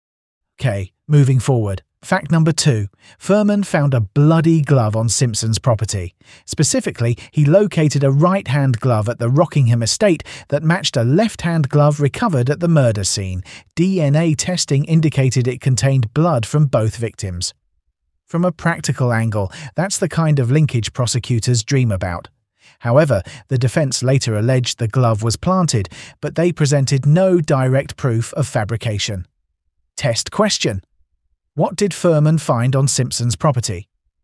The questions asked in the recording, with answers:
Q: What did Fuhrman find on Simpson's property?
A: Correct answer. A bloody glove.